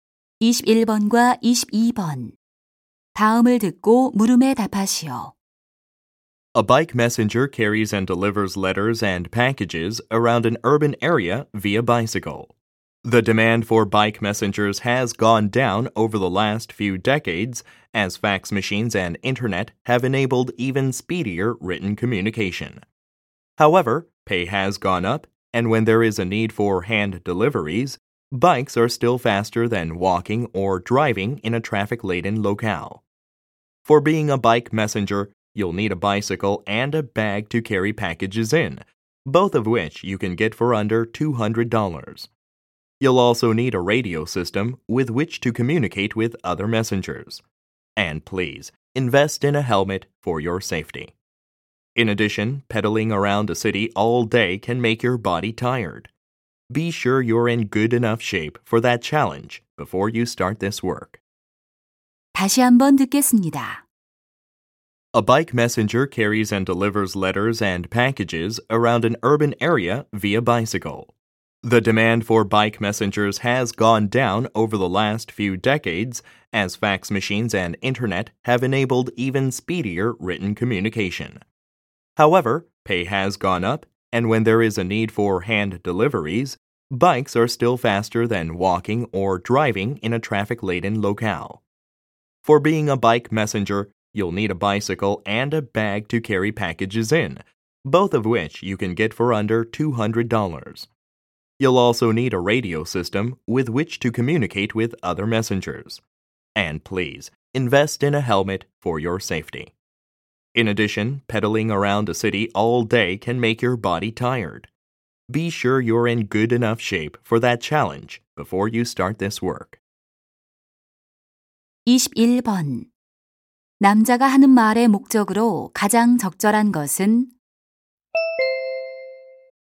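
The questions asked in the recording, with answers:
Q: 남자가 하는 말의 목적으로 가장 적절한 것은?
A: 바이크 메신저 직업을 소개하려고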